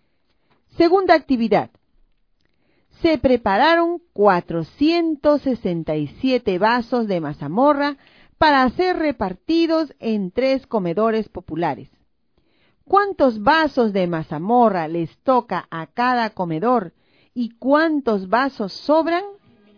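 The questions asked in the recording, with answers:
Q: ¿Cuántos vasos de mazamorra les toca a cada comedor y cuántos vasos sobran?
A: 155 vasos y sobran 2 vasos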